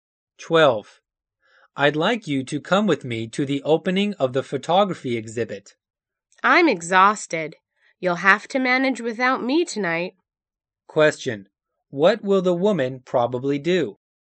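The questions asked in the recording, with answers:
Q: What will the woman probably do?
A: Stay home and rest instead of going to the exhibit.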